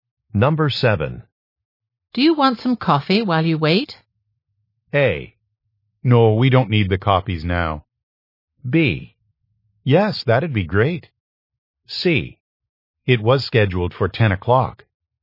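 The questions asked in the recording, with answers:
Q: Do you want some coffee while you wait?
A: B: Yes, that'd be great.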